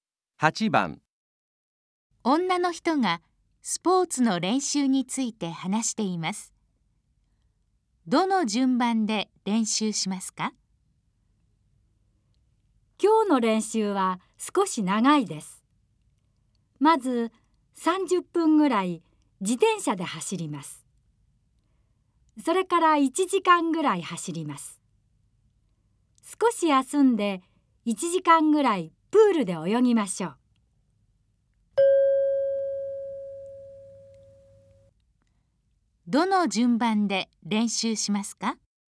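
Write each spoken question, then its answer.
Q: どの順番で練習しますか?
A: 自転車→走る→泳ぐ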